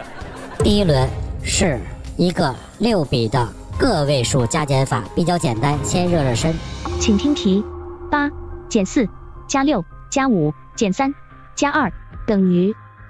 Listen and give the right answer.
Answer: 十四